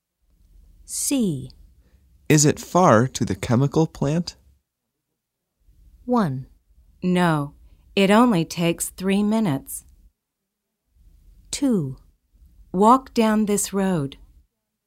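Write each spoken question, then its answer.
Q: Is it far to the chemical plant?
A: 1: No, it only takes 3 minutes.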